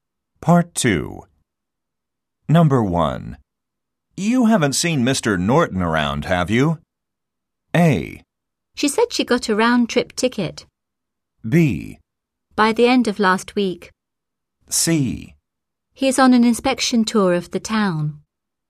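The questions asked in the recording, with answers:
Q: You haven't seen Mr.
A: C: He is on an inspection tour of the town.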